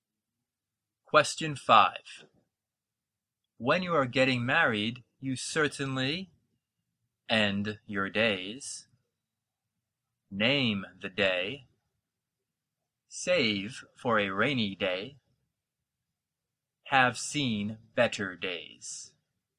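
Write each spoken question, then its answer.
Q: When you are getting married, you certainly end your days, name the day, save for a rainy day, have seen better days.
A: B: name the day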